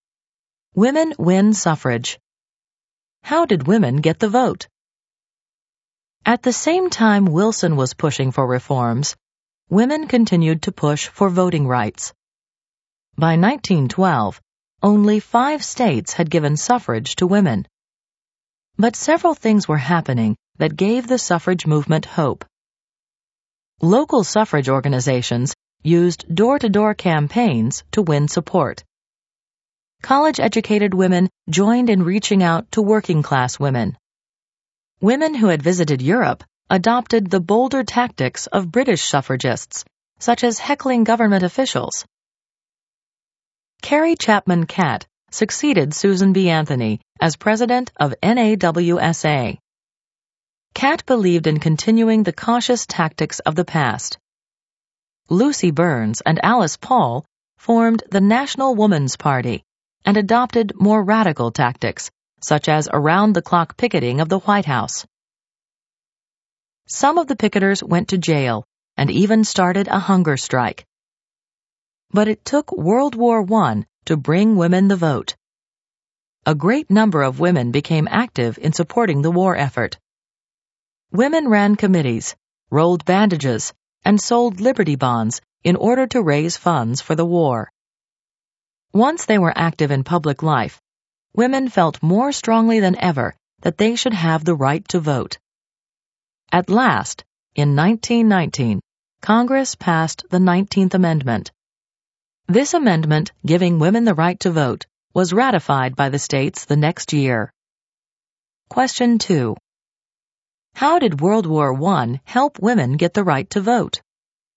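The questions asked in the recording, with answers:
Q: How did World War I help women get the right to vote?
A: Women became active in supporting the war effort and public life, which strengthened their claim to the vote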